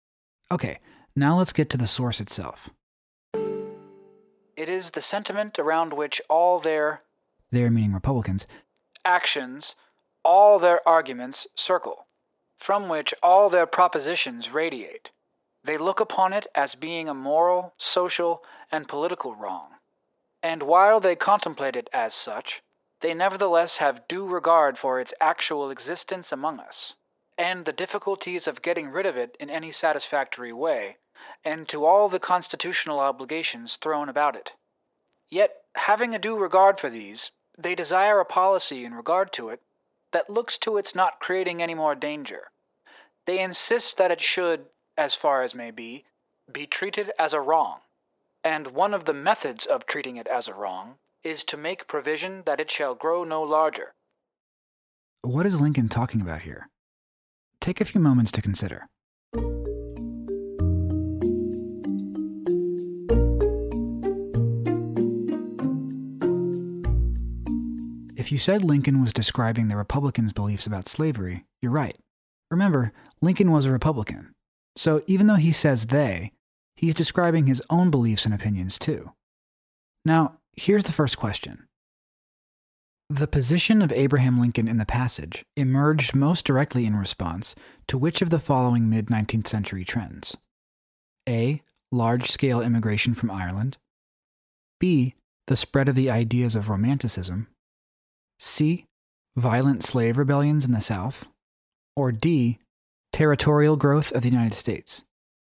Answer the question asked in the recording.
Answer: The correct answer here is D, territorial growth of the United States.